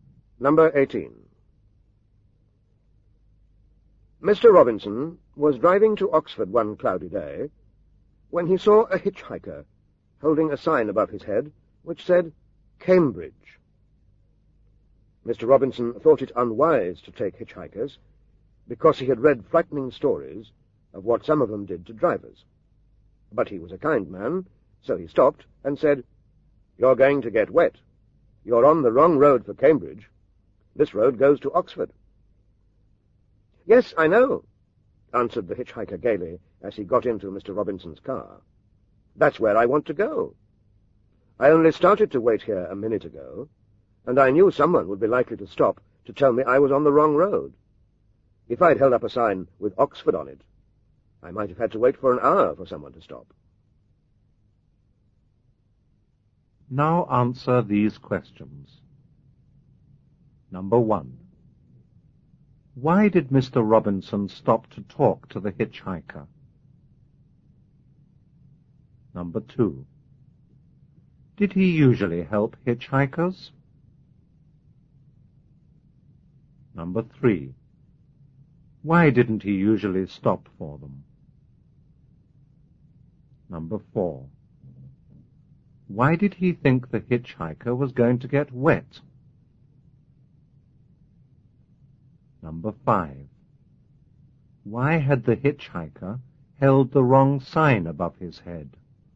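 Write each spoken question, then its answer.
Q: Why did Mr. Robinson stop to talk to the hitchhiker?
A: He was kind and wanted to tell him he was on the wrong road for Cambridge.

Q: Did he usually help hitchhikers?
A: No.

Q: Why didn't he usually stop for them?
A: He had read frightening stories of what some hitchhikers did to drivers.

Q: Why had the hitchhiker held the wrong sign above his head?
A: So drivers would stop to tell him he was on the wrong road; with an Oxford sign he might wait an hour.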